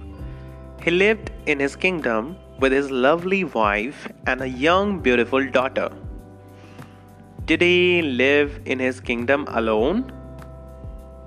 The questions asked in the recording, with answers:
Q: Did he live in his kingdom alone?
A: No, he did not live alone.